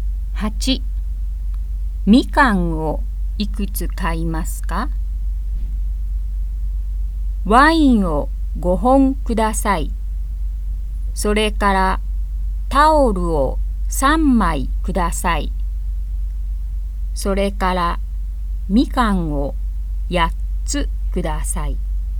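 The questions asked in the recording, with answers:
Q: みかんをいくつ買いますか?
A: 8つ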